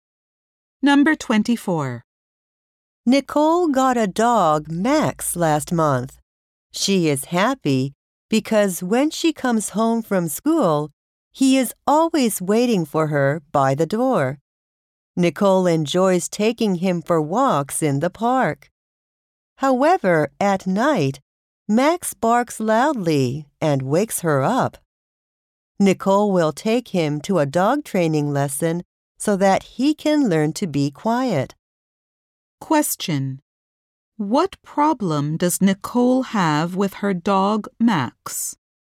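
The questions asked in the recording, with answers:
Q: What problem does Nicole have with her dog, Max?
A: He barks loudly at night and wakes her up.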